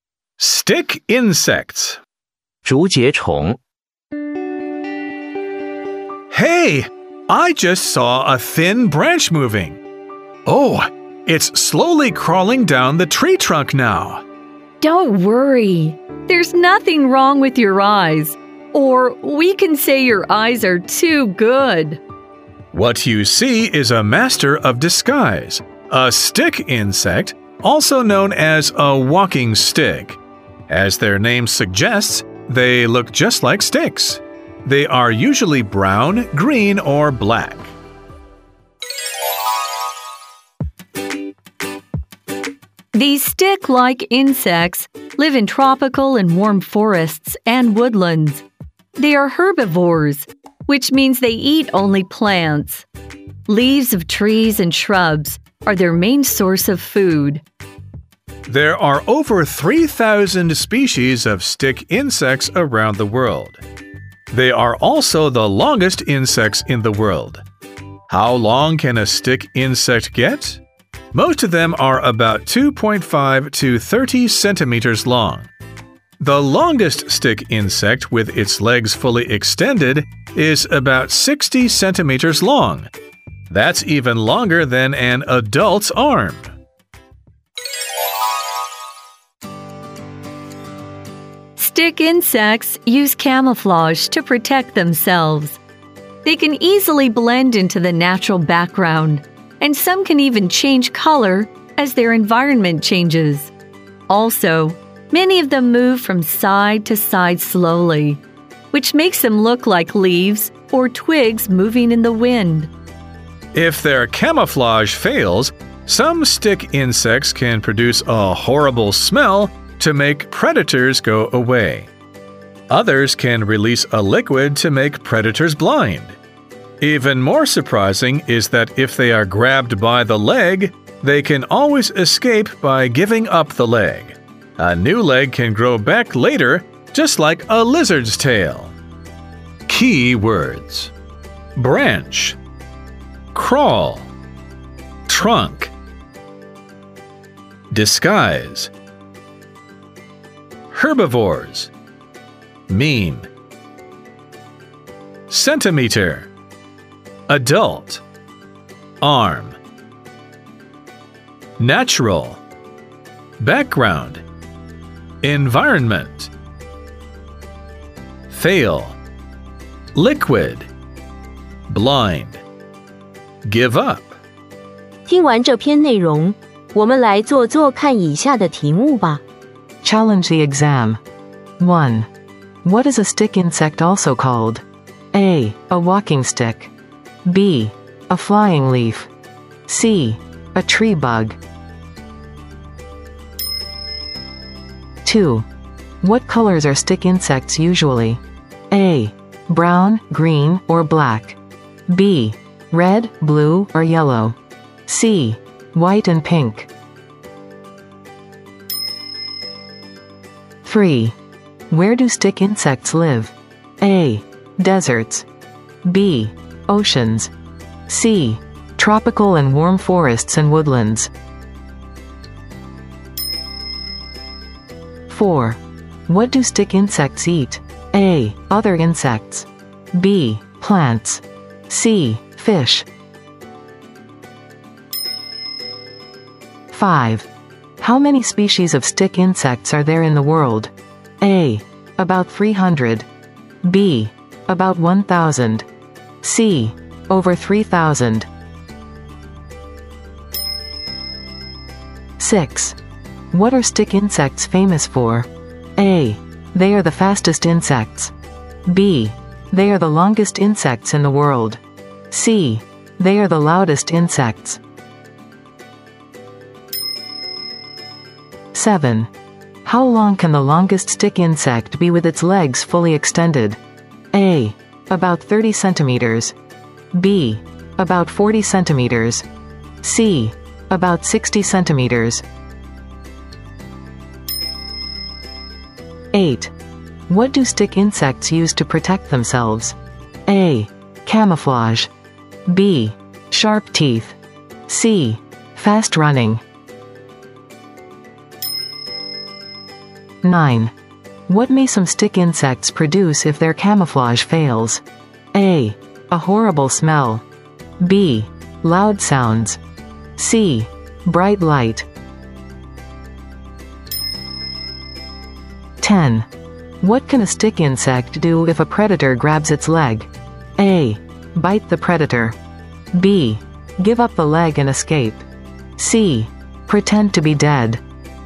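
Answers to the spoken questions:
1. A: A walking stick.
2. A: Brown, green, or black.
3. C: Tropical and warm forests and woodlands.
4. B: Plants.
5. C: Over 3,000.
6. B: They are the longest insects in the world.
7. C: About 60 centimeters.
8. A: Camouflage.
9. A: A horrible smell.
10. B: Give up the leg and escape.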